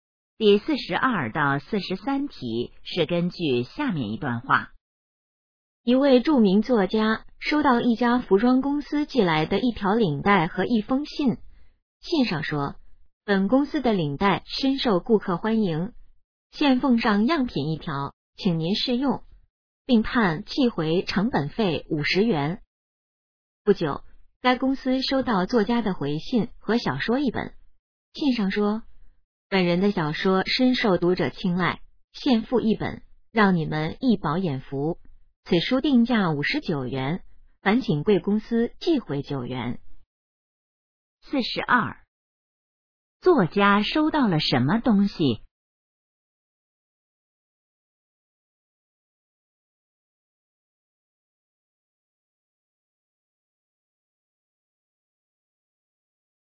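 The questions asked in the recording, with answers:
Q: 作家收到了什么东西?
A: 一条领带和一封信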